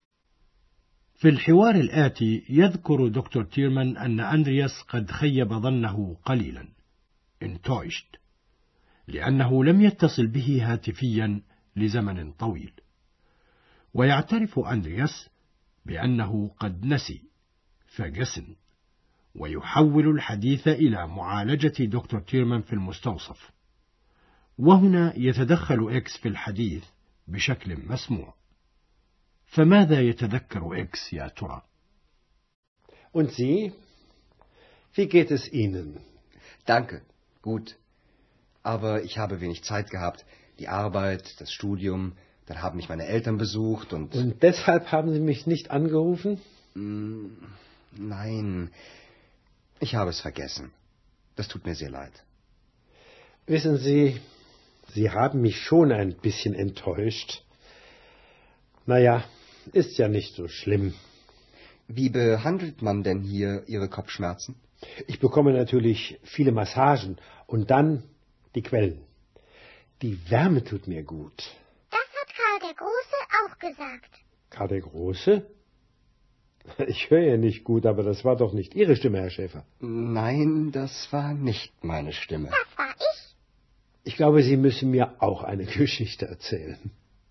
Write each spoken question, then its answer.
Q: فماذا يتذكر إكس يا ترى؟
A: يتذكر إكس المقابلة التي أجراها أندرياس مع القيصر شارلمان الذي قال فيها إن الينابيع الحارة تنفعه وتفيده كثيرا.